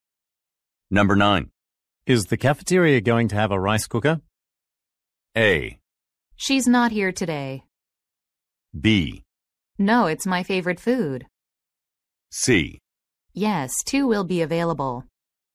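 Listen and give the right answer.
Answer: C: Yes, two will be available.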